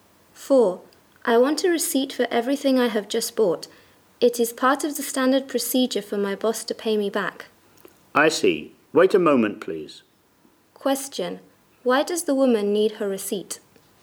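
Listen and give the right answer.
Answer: So her boss can pay her back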